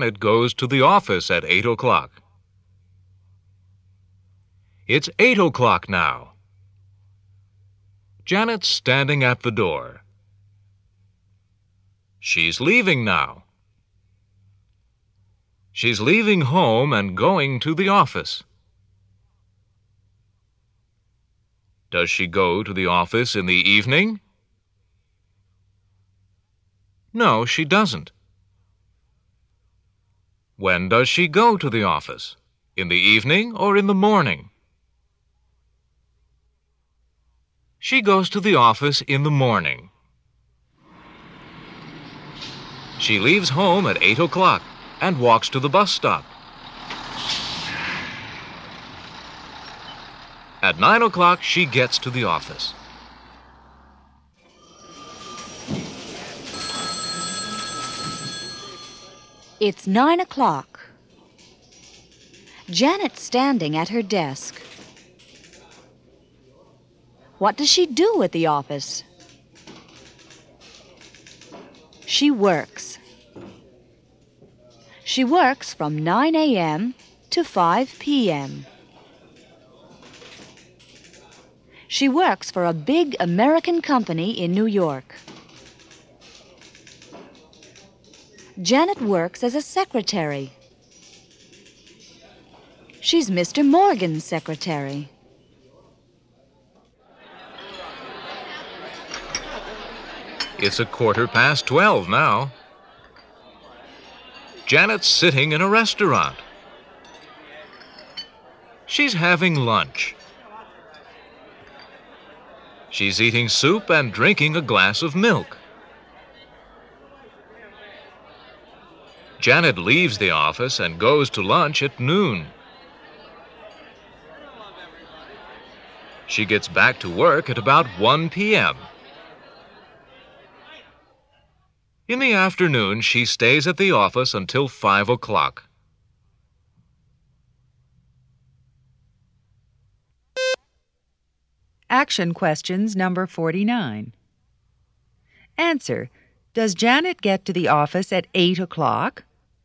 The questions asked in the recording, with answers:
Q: Does Janet get to the office at 8 o'clock?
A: No, she doesn't.